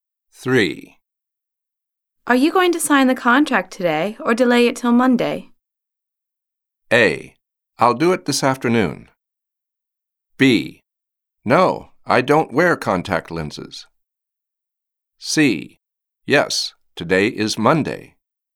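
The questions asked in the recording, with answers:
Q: Are you going to sign the contract today or delay it till Monday?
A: A: I'll do it this afternoon.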